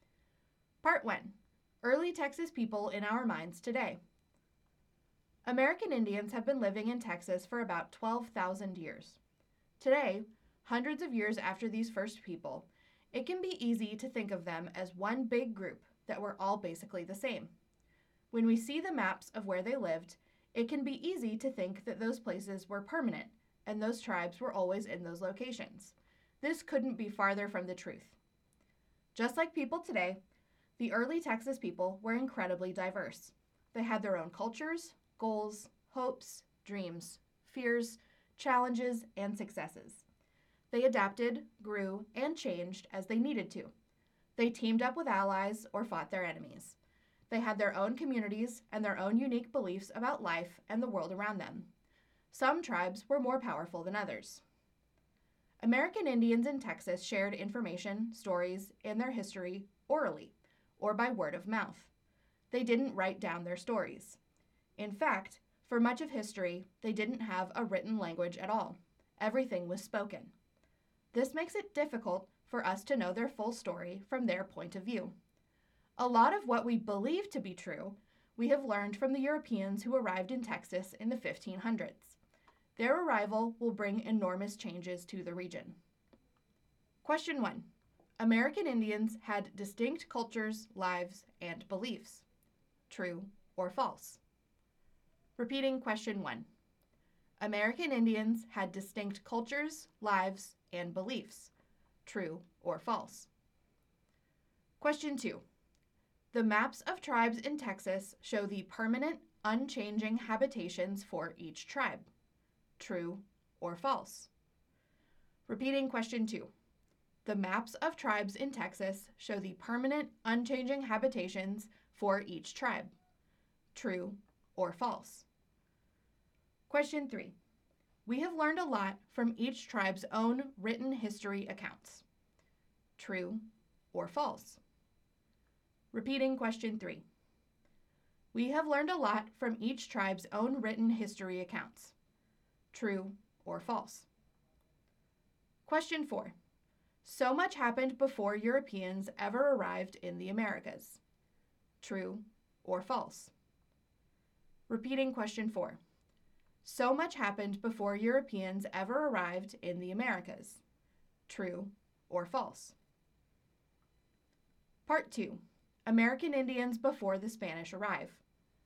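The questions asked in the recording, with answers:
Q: American Indians had distinct cultures, lives, and beliefs. True or false?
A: True

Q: The maps of tribes in Texas show the permanent, unchanging habitations for each tribe. True or false?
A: False

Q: We have learned a lot from each tribe's own written history accounts. True or false?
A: False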